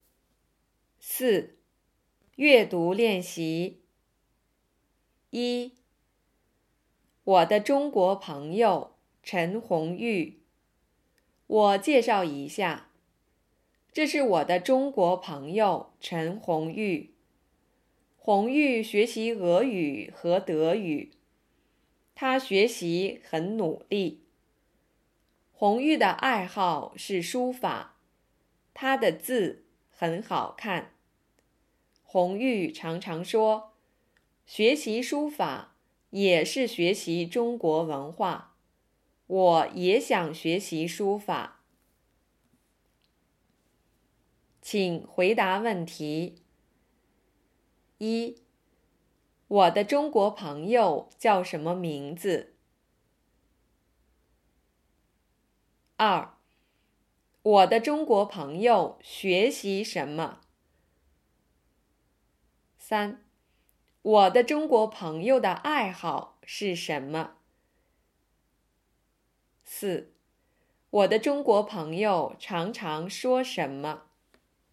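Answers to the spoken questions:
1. 陈红玉
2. 俄语和德语
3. 书法
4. 学习书法也是学习中国文化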